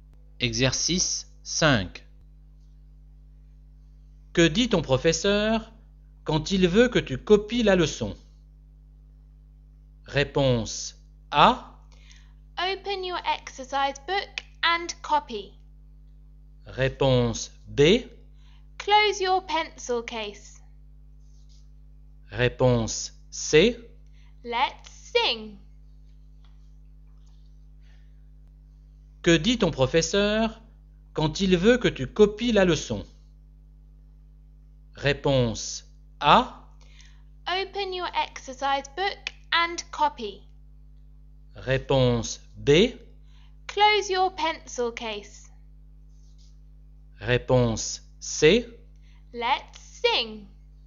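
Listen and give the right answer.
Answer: A: Open your exercise book and copy.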